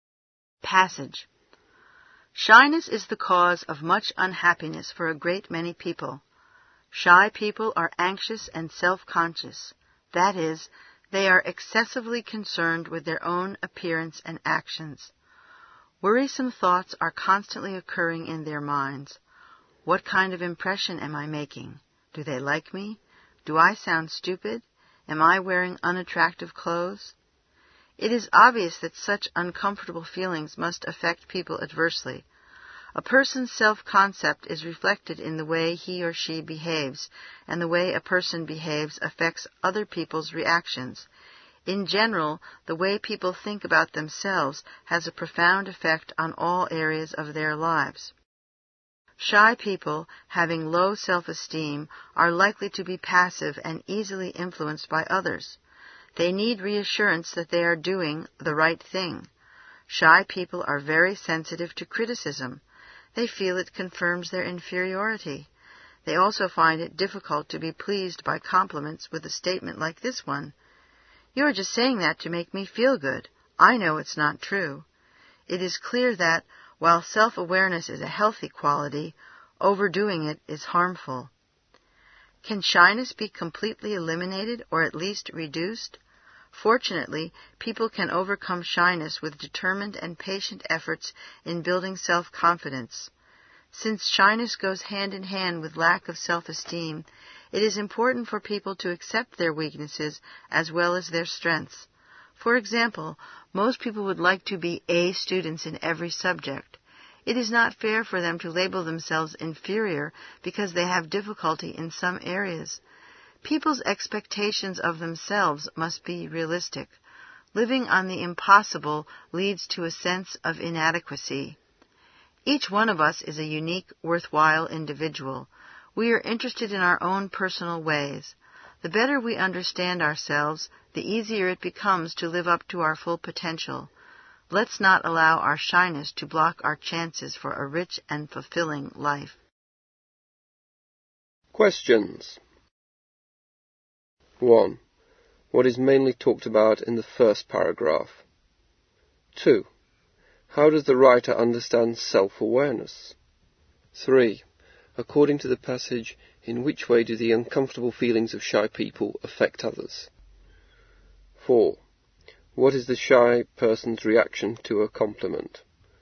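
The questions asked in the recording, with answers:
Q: How does the writer understand self-awareness?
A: It is healthy, but overdoing it is harmful

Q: According to the passage, in which way do the uncomfortable feelings of shy people affect others?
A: Through their behavior, which affects others' reactions

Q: What is the shy person's reaction to a compliment?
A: They think it is not true, only said to make them feel good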